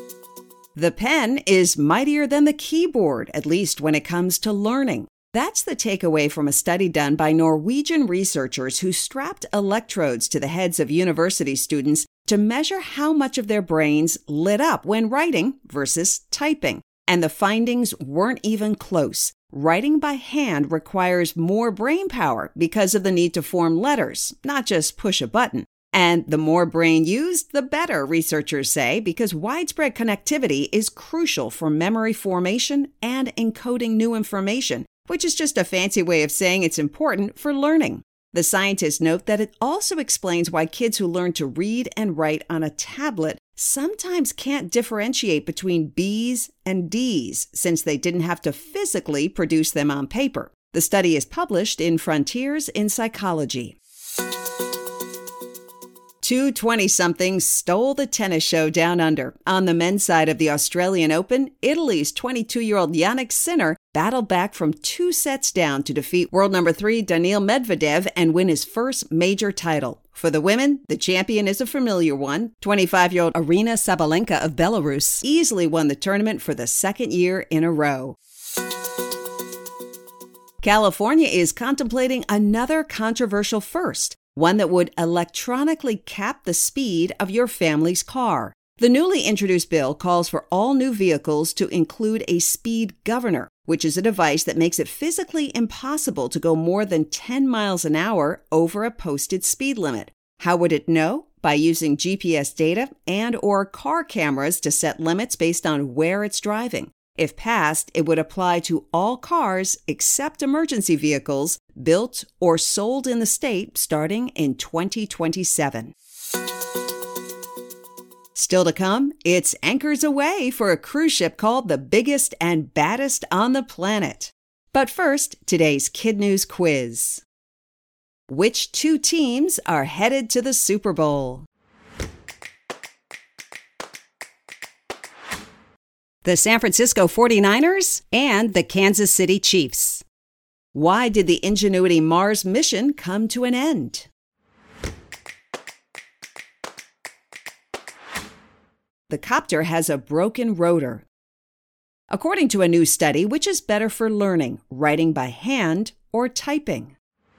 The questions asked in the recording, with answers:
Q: According to a new study, which is better for learning, writing by hand or typing?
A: Writing by hand.